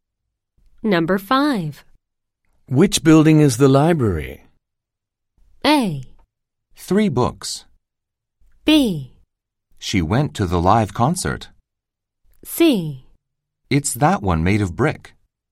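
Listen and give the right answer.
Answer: C: It's that one made of brick.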